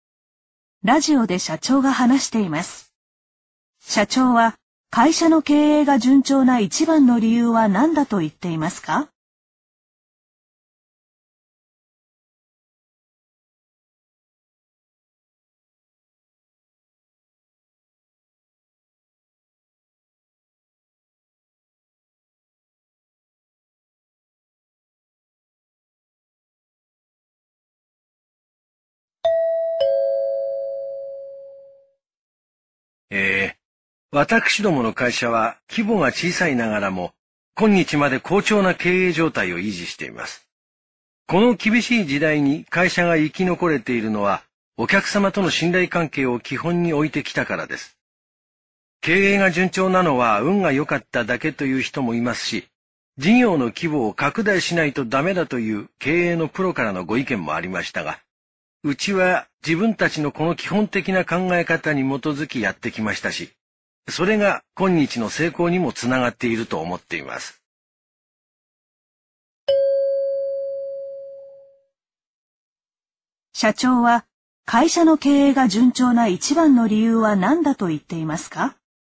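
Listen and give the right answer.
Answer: お客様との信頼関係を基本に置いてきたから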